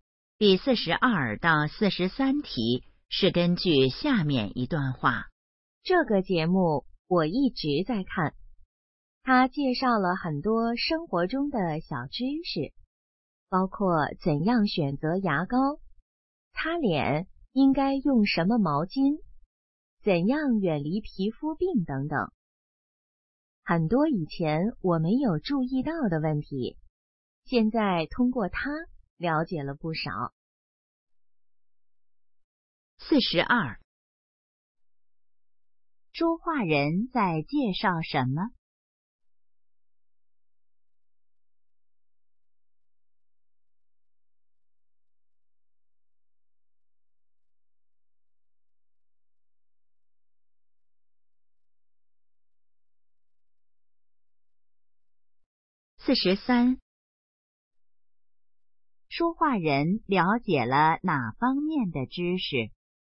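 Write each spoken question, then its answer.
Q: 说话人在介绍什么?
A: 一个节目

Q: 说话人了解了哪方面的知识?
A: 生活中的小知识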